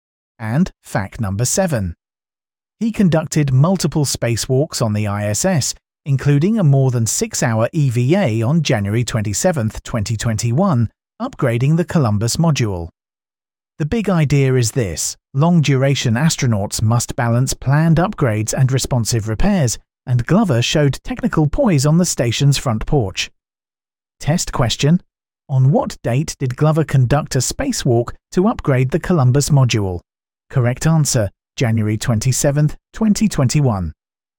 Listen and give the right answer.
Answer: January 27, 2021.